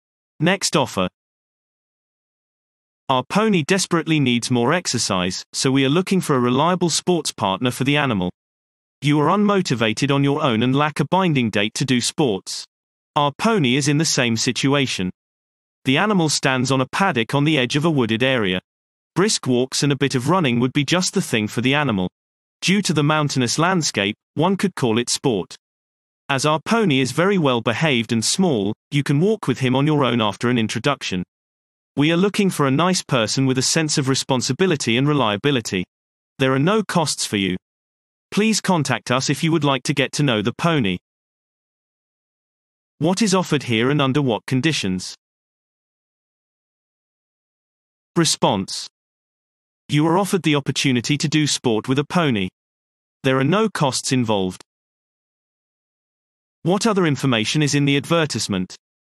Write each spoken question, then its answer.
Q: What other information is in the advertisement?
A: The pony urgently needs more exercise.